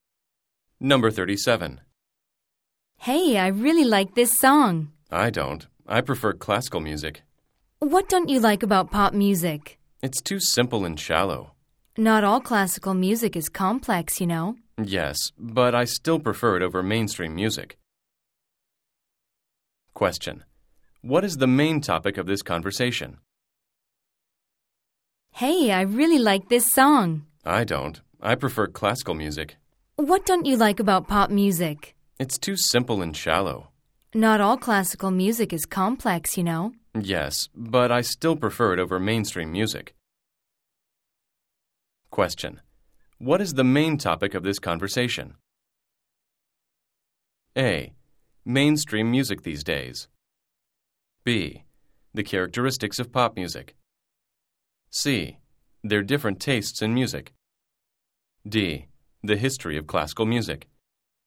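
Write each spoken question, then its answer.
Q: What is the main topic of this conversation?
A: C: Their different tastes in music.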